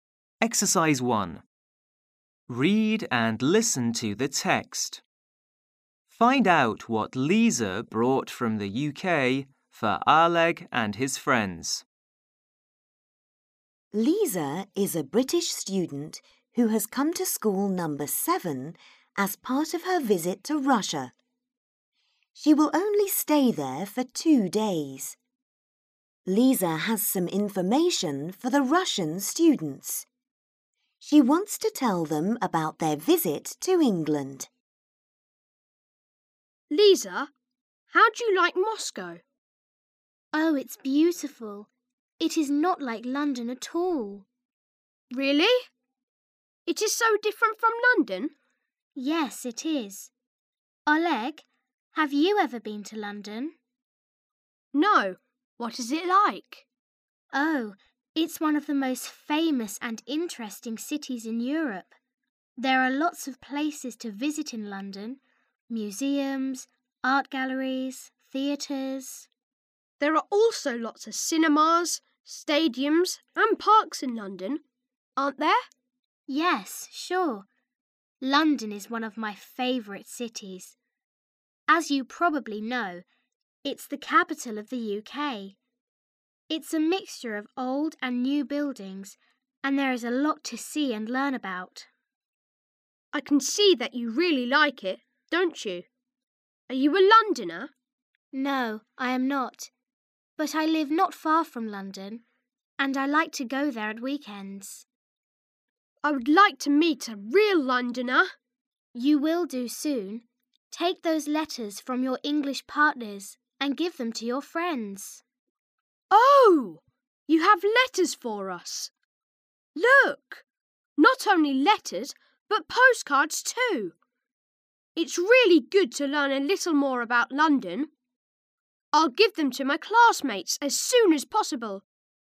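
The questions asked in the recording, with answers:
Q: Find out what Lisa brought from the UK for Aleg and his friends.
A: Letters and postcards from their English partners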